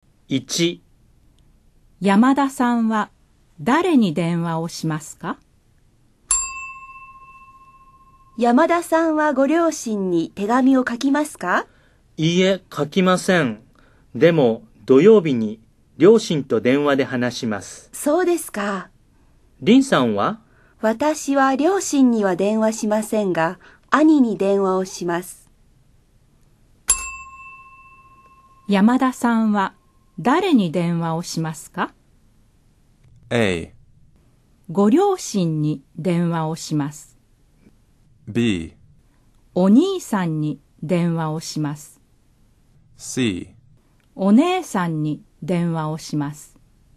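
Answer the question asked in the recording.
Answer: A: ご両親に電話をします。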